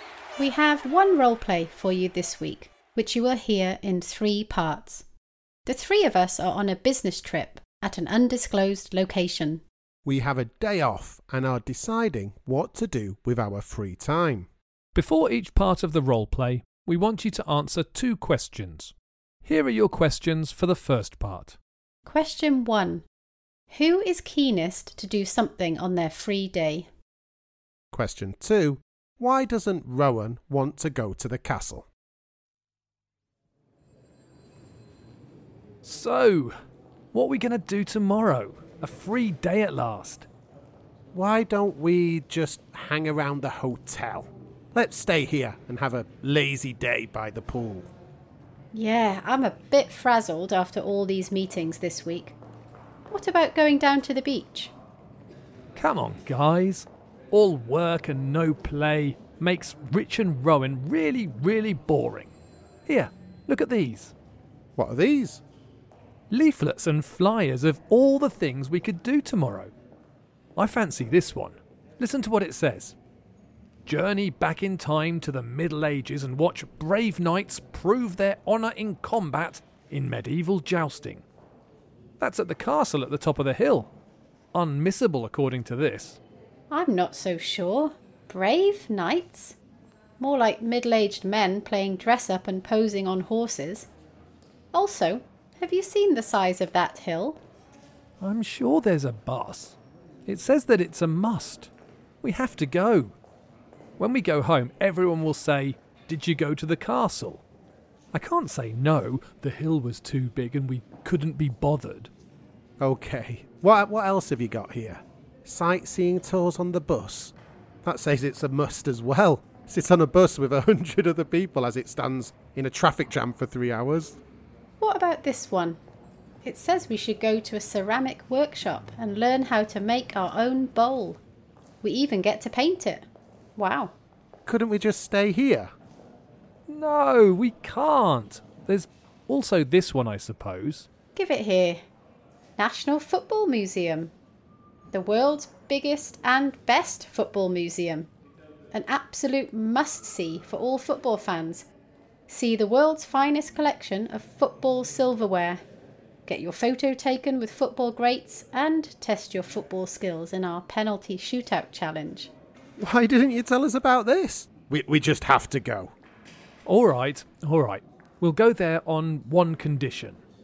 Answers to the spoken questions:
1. There's no doubt that the correct answer is me.
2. Well, first of all, she didn't want to walk to the top of the hill, and she also thought the people dressed up as knights at the castle wouldn't be very convincing.